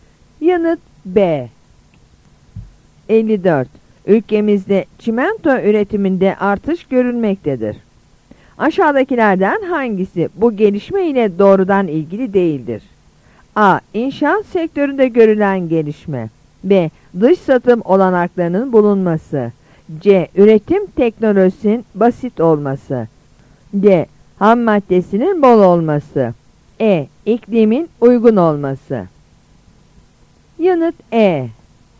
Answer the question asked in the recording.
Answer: Yanıt E.